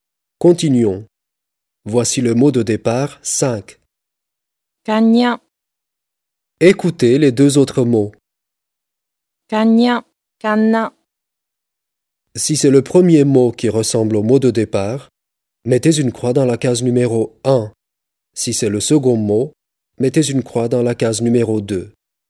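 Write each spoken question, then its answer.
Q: Si c'est le premier mot qui ressemble au mot de départ, mettez une croix dans la case numéro 1.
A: 1: cagna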